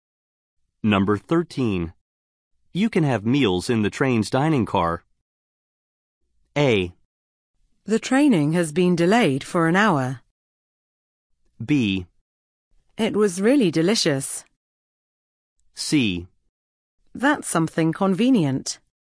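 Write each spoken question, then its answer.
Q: You can have meals in the train's dining car.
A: C: That's something convenient.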